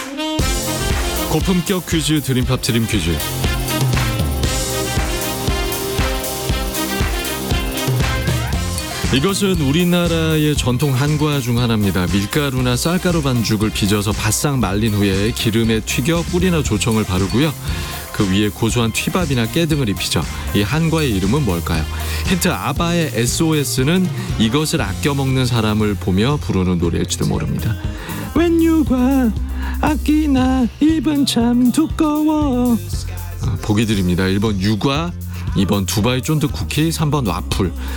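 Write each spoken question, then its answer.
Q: 이 한과의 이름은 뭘까요?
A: 1: 유과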